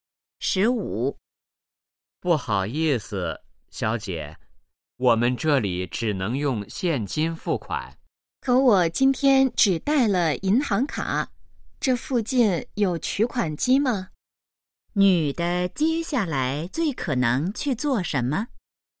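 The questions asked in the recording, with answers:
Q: 女的接下来最可能去做什么?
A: 去取款机取钱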